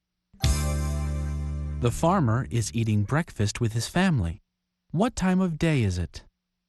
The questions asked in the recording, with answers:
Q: What time of day is it?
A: It's morning.